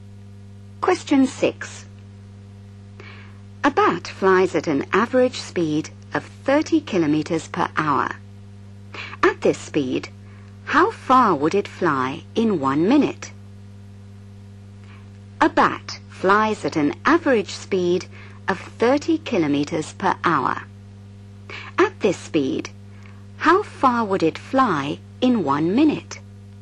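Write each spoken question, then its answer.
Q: At this speed, how far would it fly in 1 minute?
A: 0.5 km (500 m)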